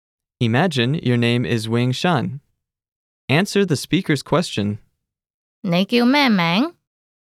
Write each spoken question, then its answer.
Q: 你叫咩名?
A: 我叫永山。